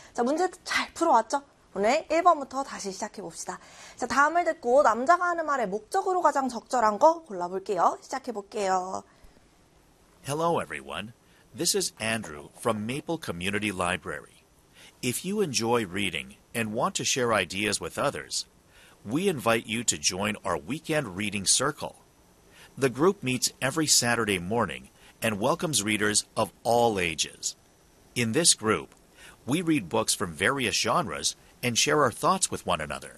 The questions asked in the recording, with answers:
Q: 다음을 듣고 남자가 하는 말의 목적으로 가장 적절한 거 골라볼게요.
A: 도서관에서 열리는 독서 모임에 초대하려고, 홍보하려고가 되겠습니다.